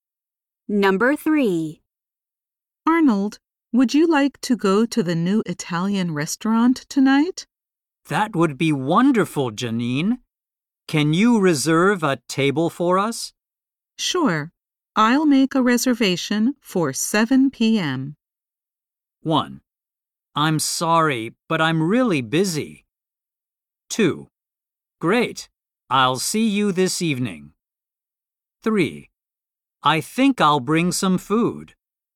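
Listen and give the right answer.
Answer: 2: Great. I'll see you this evening.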